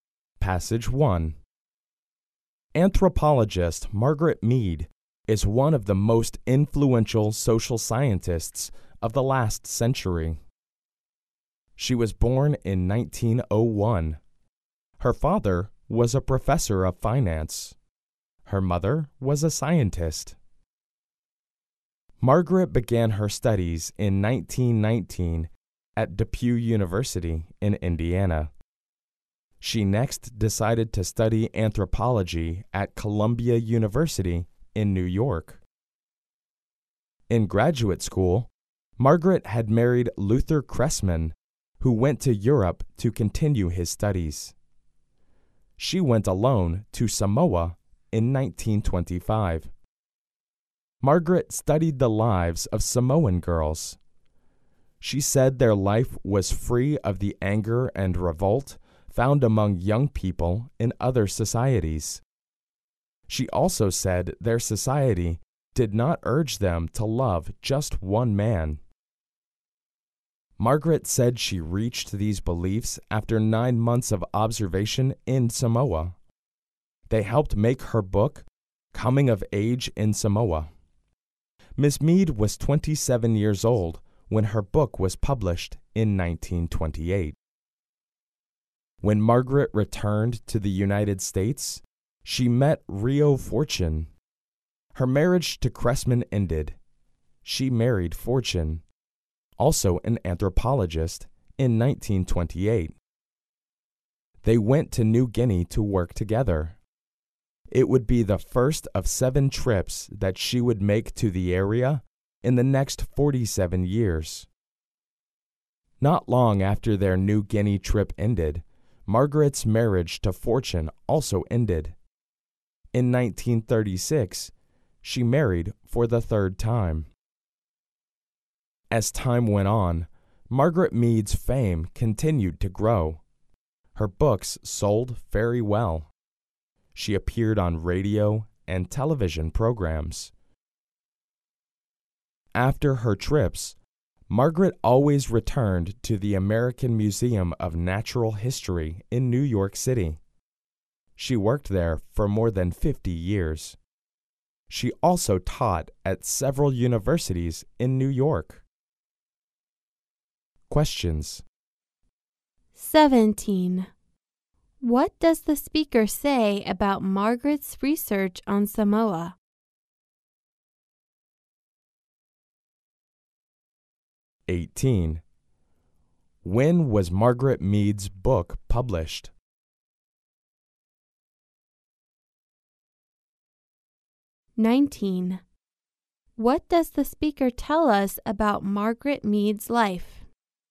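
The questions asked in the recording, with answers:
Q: When was Margaret Mead's book published?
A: In 1928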